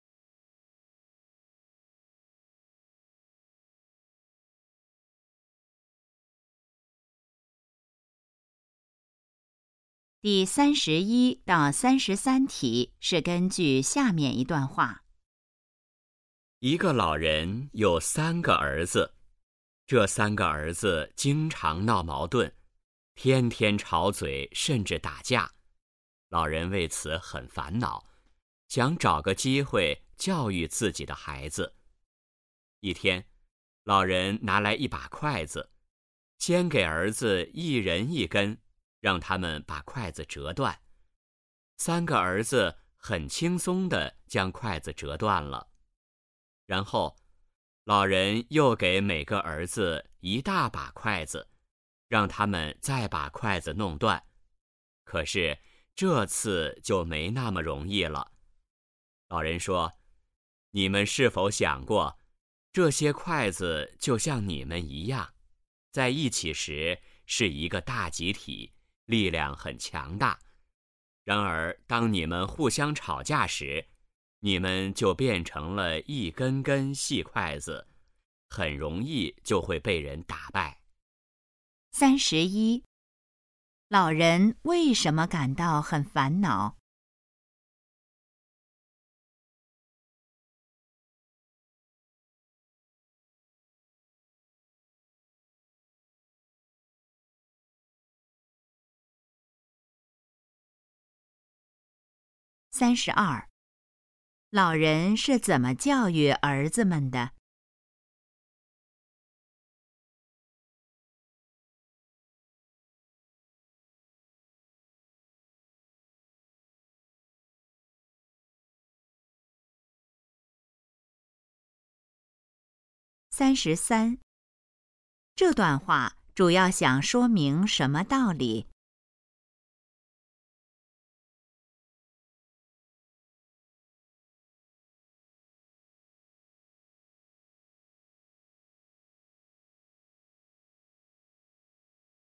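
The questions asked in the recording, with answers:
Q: 老人为什么感到很烦恼?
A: 三个儿子经常闹矛盾

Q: 老人是怎么教育儿子们的?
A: 让他们折筷子

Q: 这段话主要想说明什么道理?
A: 团结力量大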